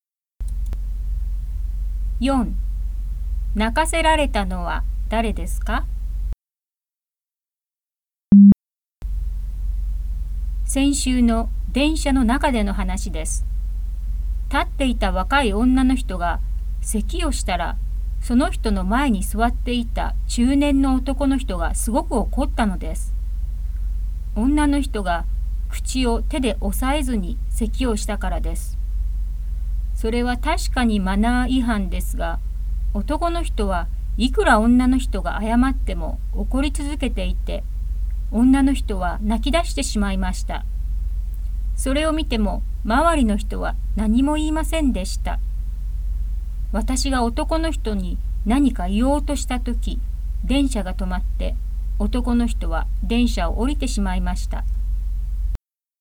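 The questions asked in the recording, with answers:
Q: 泣かせられたのは誰ですか?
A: 電車で立っていた若い女の人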